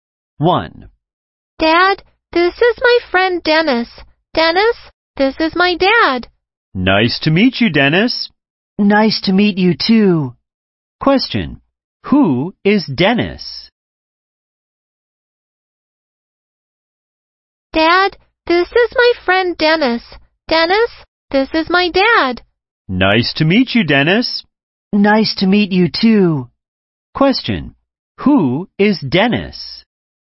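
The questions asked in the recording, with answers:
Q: Who is Dennis?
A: The child's friend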